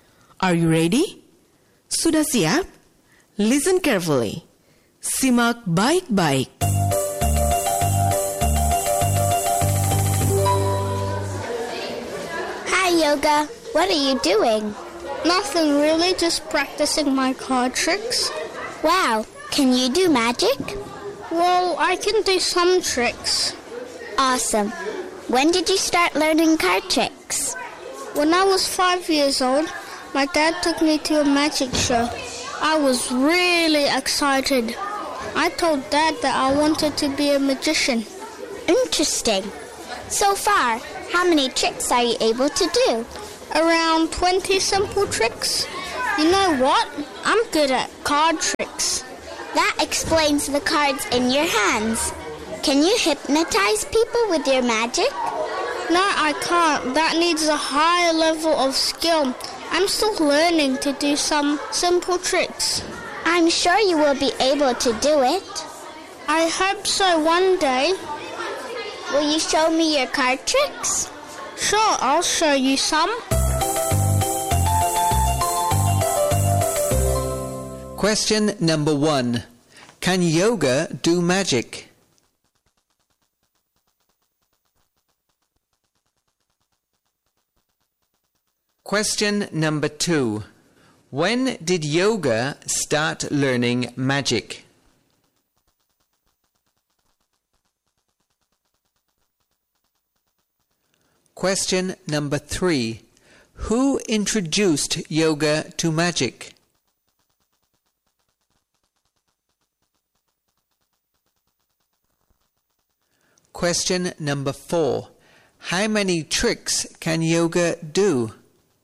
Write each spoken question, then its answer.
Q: Can yoga do magic?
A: Yes, yoga can do magic.

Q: When did yoga start learning magic?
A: When he was 5 years old.

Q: Who introduced yoga to magic?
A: His dad.

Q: How many tricks can yoga do?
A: Around 20 tricks.